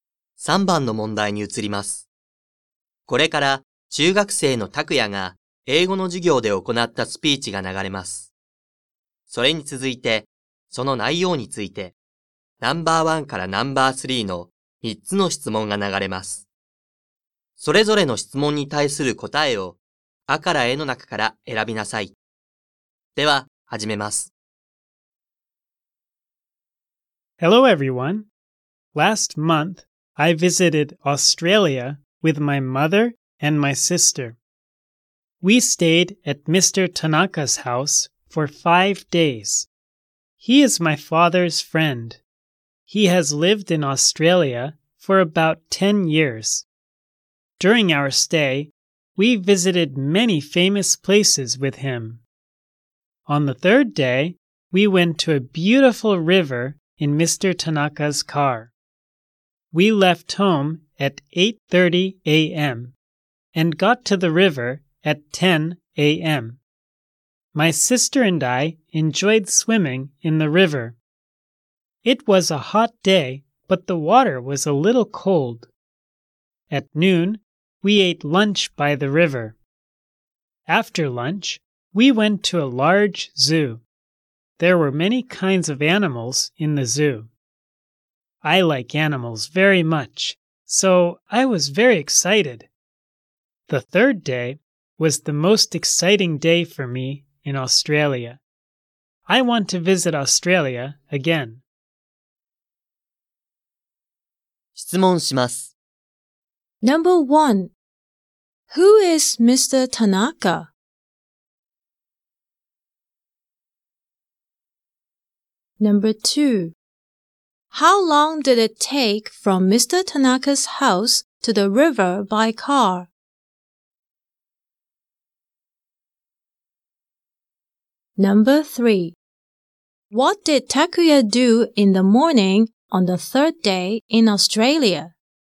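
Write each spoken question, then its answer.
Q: who is Mr. Tanaka?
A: He is Takuya's father's friend.

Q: How long did it take from Mr. Tanaka's house to the river by car?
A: An hour and a half (90 minutes).

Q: What did Takuya do in the morning on the third day in Australia?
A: He swam in the river with his sister.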